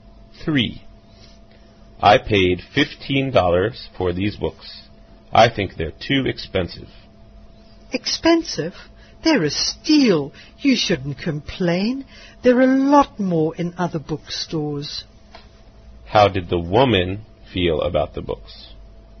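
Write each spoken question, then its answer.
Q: How did the woman feel about the books?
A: They were a bargain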